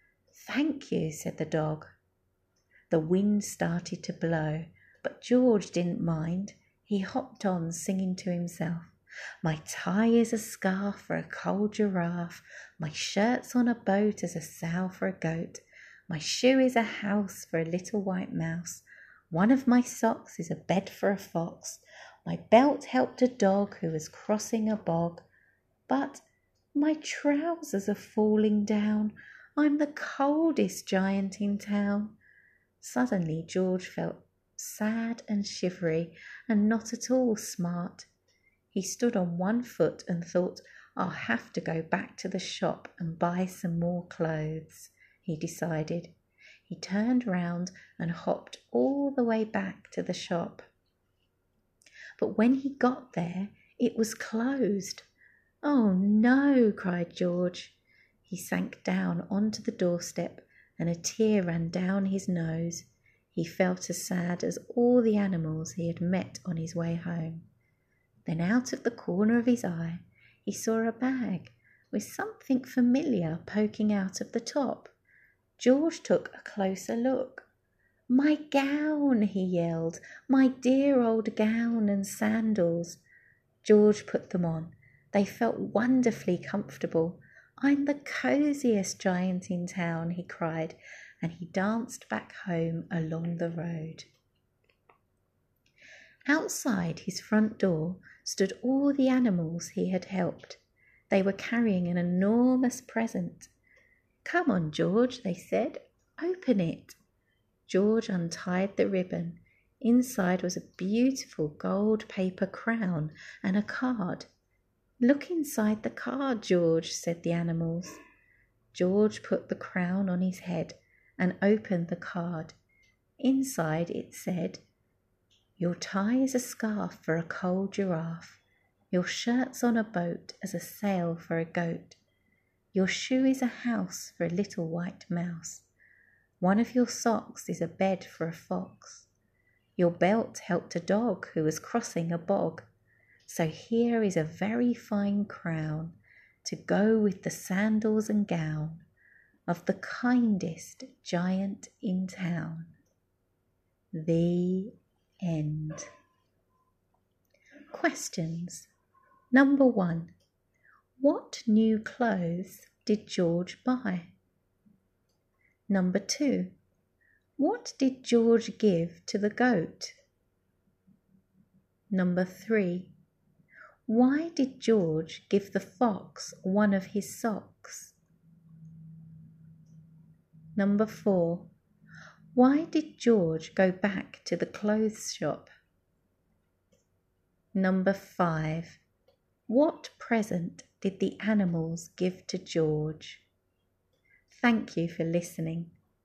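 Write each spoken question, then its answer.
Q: what did George give to the goat?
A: His shirt, to use as a sail for its boat

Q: why did George give the fox one of his socks?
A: So the fox could use it as a bed

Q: why did George go back to the clothes shop?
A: He was cold and wanted to buy more clothes

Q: what present did the animals give to George?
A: A gold paper crown and a card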